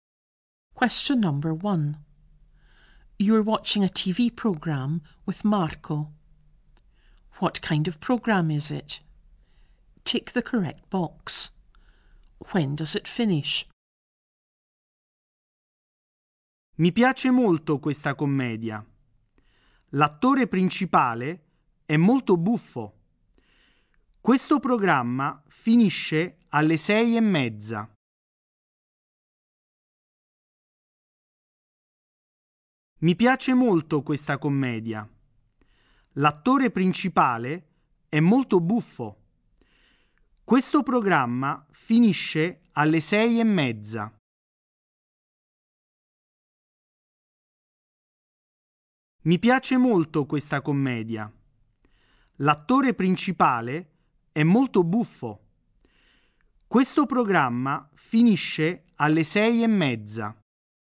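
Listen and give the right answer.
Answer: At 6:30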